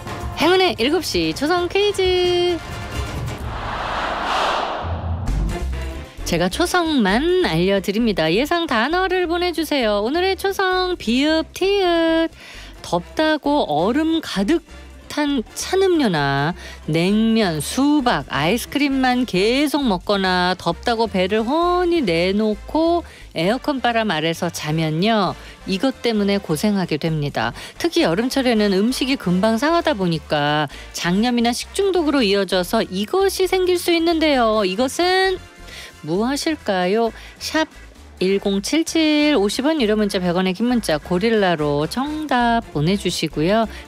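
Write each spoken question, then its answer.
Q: 이것은 무엇일까요?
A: 배탈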